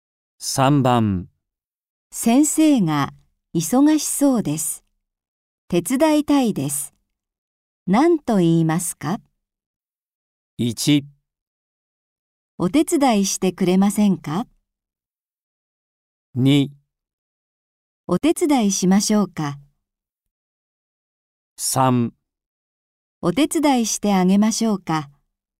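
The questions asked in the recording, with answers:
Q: 先生が忙しそうです。手伝いたいです。何と言いますか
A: 2: お手伝いしましょうか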